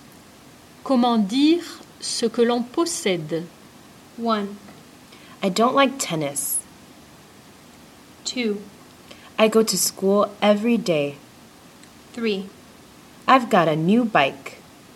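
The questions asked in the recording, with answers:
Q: Comment dire ce que l'on possède?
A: 3: I've got a new bike.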